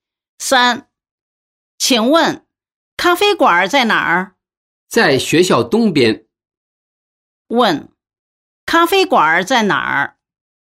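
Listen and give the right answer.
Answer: 学校东边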